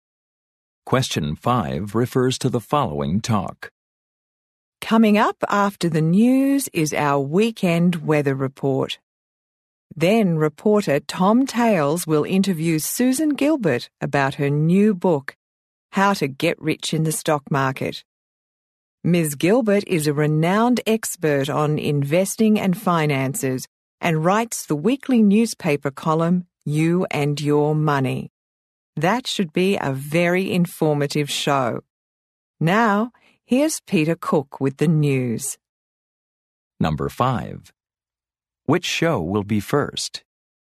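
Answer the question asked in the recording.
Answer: The news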